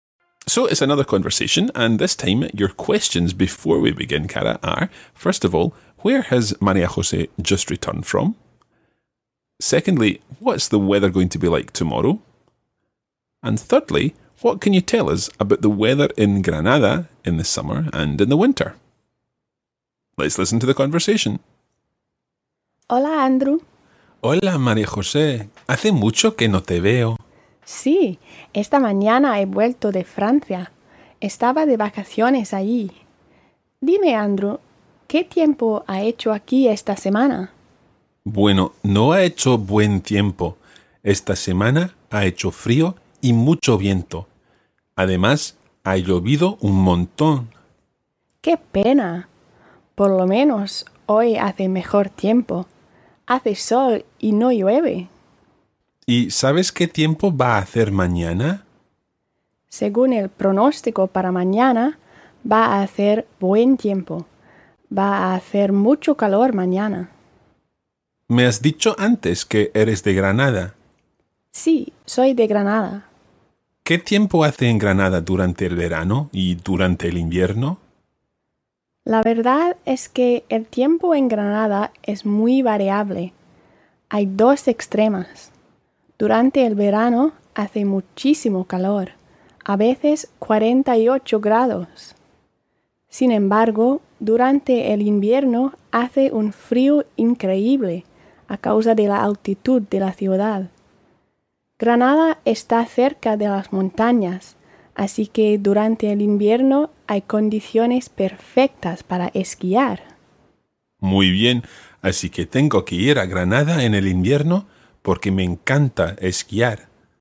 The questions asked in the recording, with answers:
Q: first of all, where has María José just returned from?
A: She's just back from France.

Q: Secondly, what's the weather going to be like tomorrow?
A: She said it was going to be nice weather.

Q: And thirdly, what can you tell us about the weather in Granada in the summer and in the winter?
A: She said that there were two extremes, and that in summer it was really, really warm, and in winter it's incredibly cold.